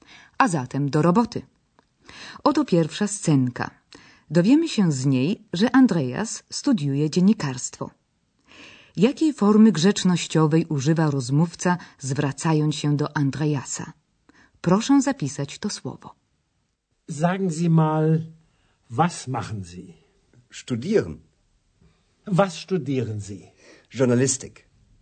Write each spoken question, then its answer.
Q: jakiej formy grzecznościowej używa rozmówca, zwracając się do Andreasa.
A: grzecznościowa forma zi, czyli pan pani